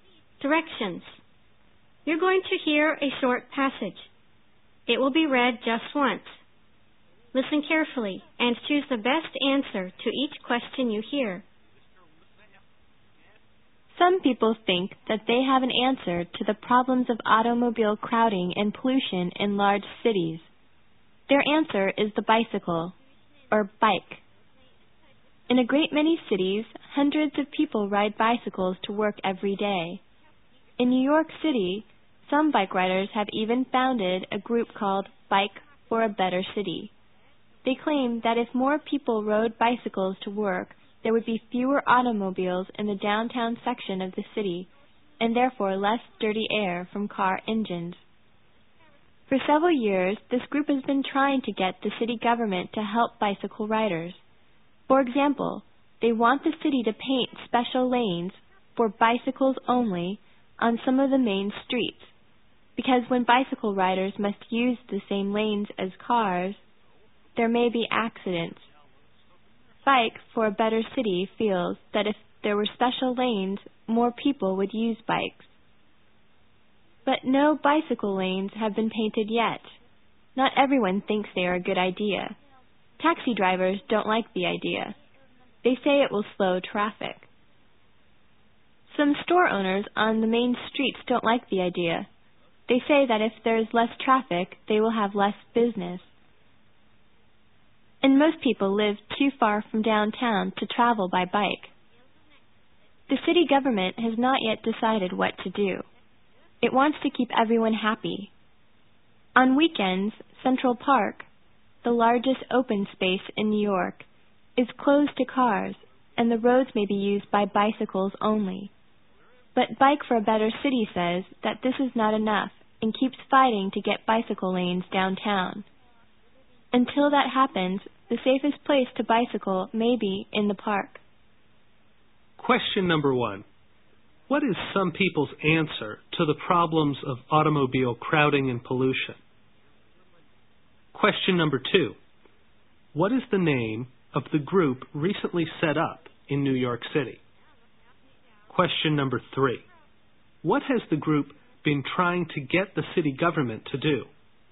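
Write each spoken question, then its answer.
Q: What is some people's answer to the problems of automobile crowding and pollution?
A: The bicycle

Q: What is the name of the group recently set up in New York City?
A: Bike for a Better City

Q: What has the group been trying to get the city government to do?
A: Paint special bicycle lanes on some main streets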